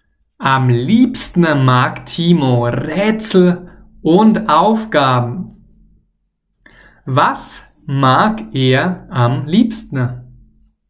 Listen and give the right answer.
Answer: Rätsel und Aufgaben, genau.